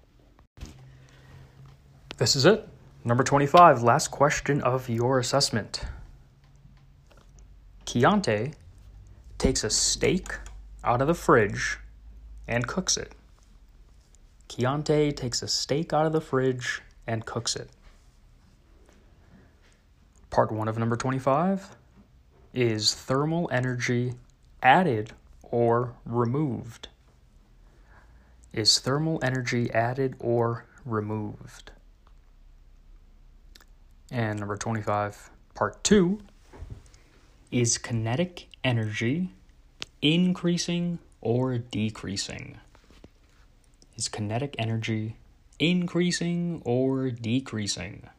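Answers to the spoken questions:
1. added
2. increasing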